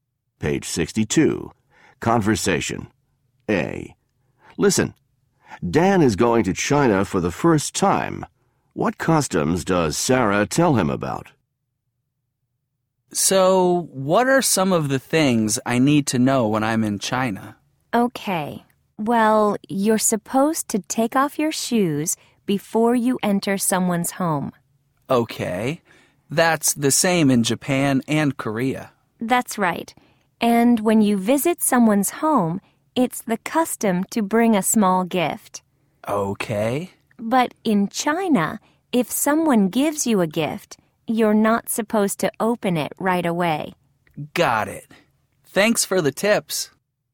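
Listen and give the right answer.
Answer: Take off your shoes before entering someone's home, bring a small gift when visiting, and don't open a gift right away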